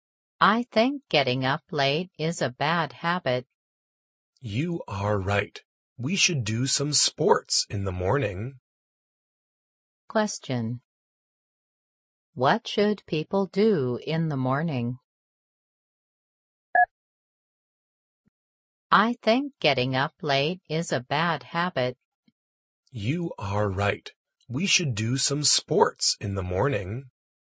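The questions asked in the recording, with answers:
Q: What should people do in the morning?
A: Do some sports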